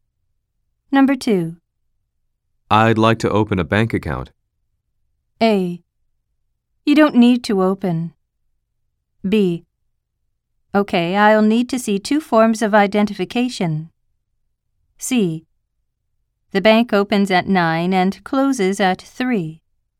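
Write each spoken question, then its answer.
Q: I'd like to open a bank account.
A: B: Okay, I'll need to see two forms of identification.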